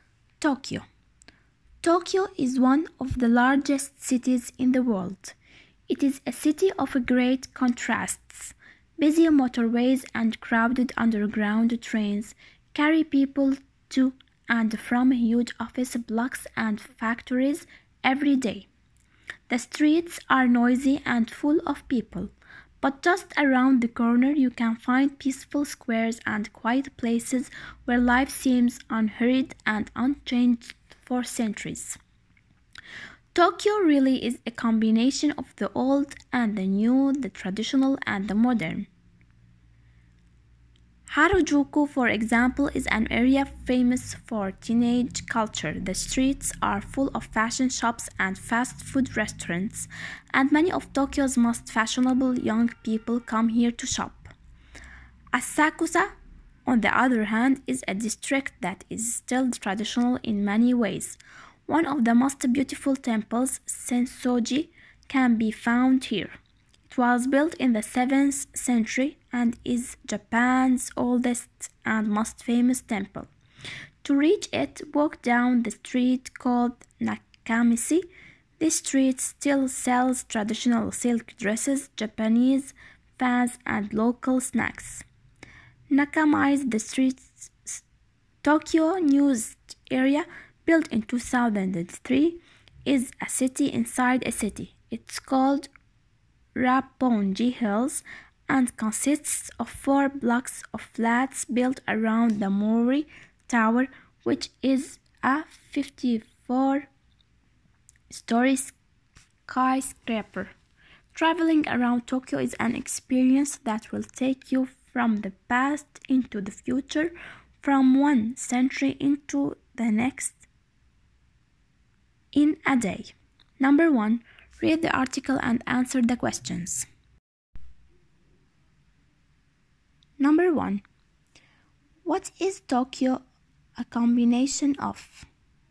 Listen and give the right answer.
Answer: the old and the new, the traditional and the modern.